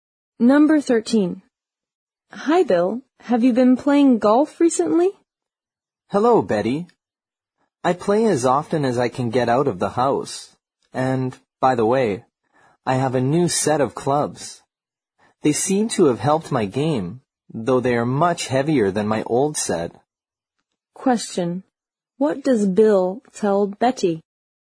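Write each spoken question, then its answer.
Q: What does Bill tell Betty?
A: His new, heavier golf clubs have helped his game.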